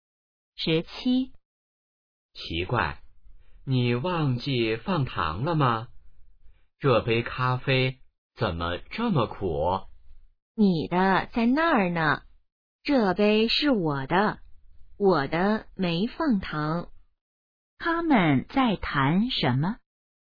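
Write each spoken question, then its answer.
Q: 他们在谈什么?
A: 咖啡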